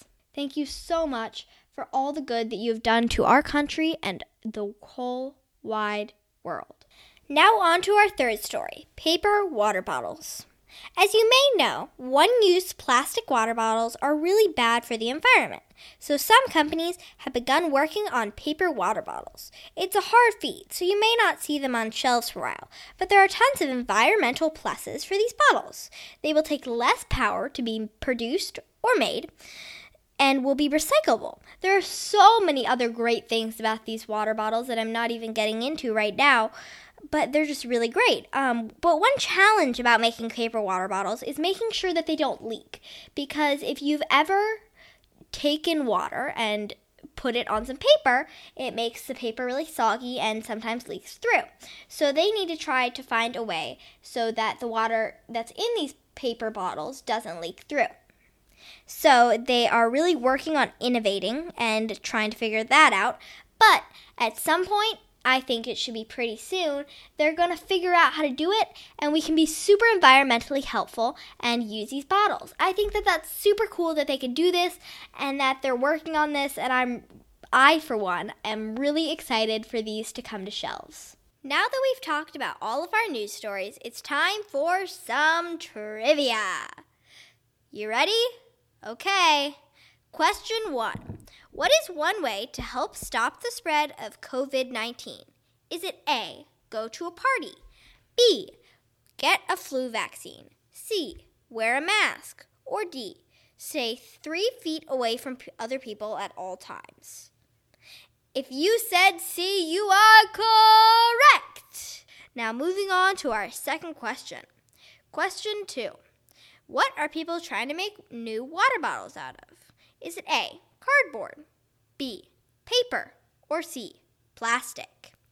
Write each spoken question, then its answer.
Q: What are people trying to make new water bottles out of?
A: If you said B, you are correct.